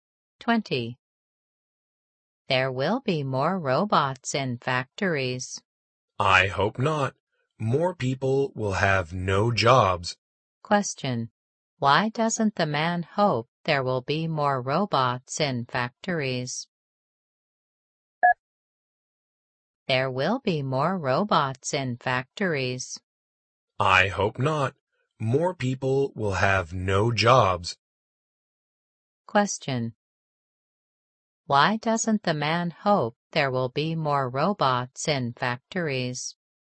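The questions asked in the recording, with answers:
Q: Why doesn't the man hope there will be more robots in factories?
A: Because more people will have no jobs.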